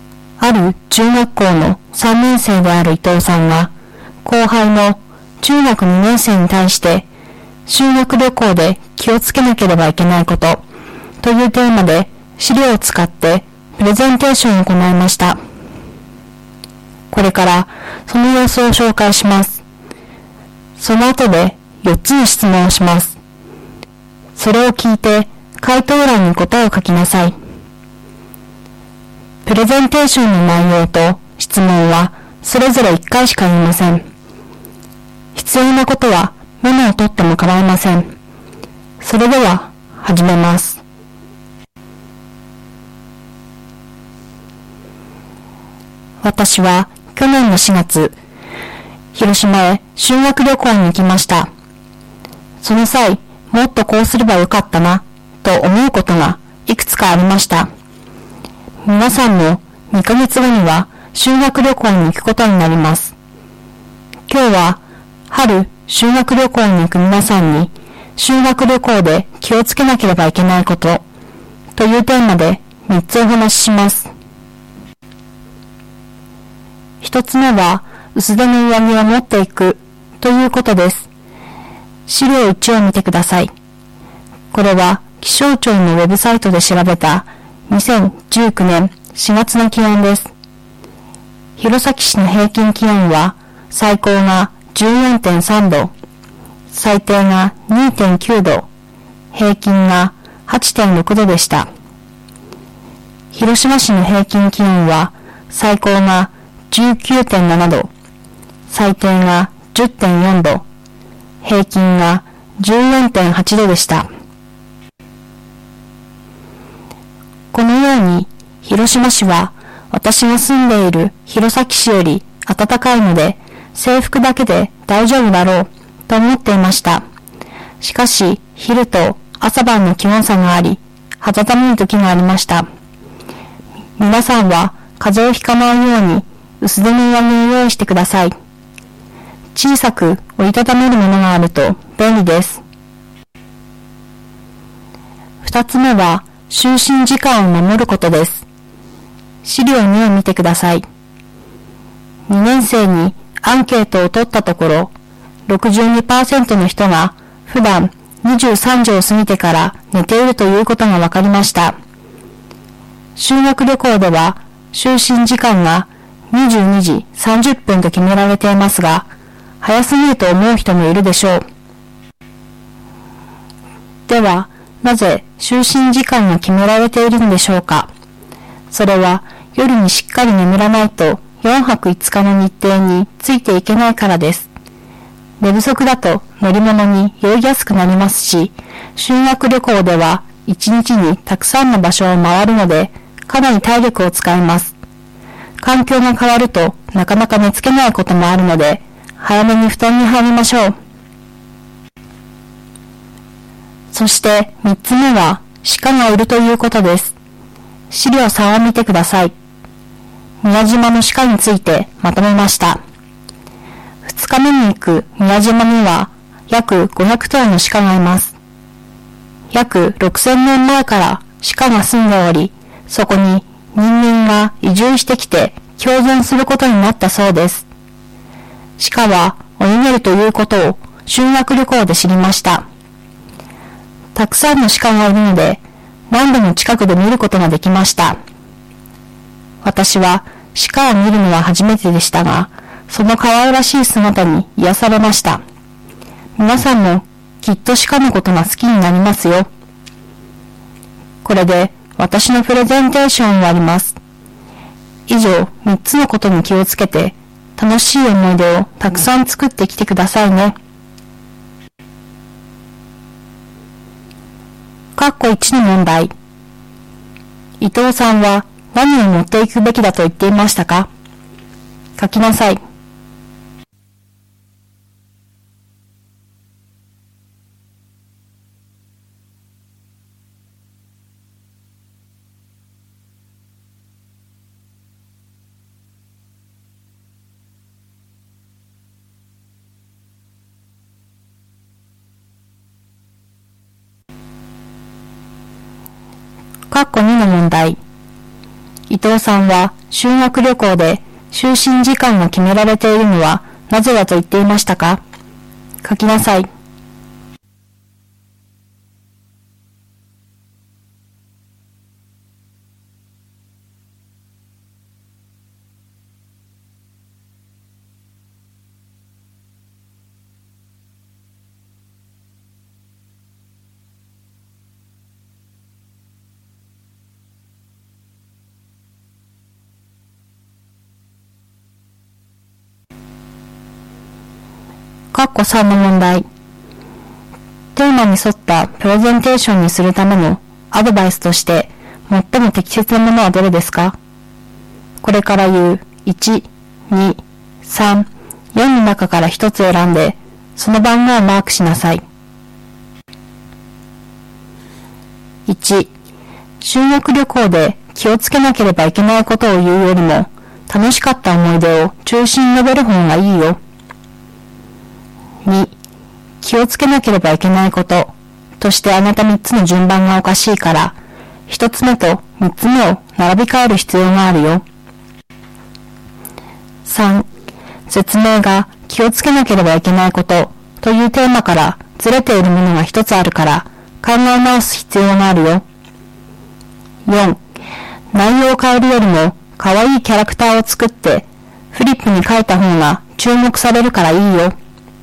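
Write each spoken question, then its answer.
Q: 伊藤さんは何を持っていくべきだと言っていましたか?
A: 薄手の上着

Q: 伊藤さんは修学旅行で就寝時間が決められているのはなぜだと言っていましたか?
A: 夜にしっかり眠らないと4泊5日の日程についていけないから

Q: テーマに沿ったプレゼンテーションにするためのアドバイスとして最も適切なものはどれですか?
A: 3: 説明が気をつけなければいけないことというテーマからずれているものが1つあるから、考え直す必要があるよ。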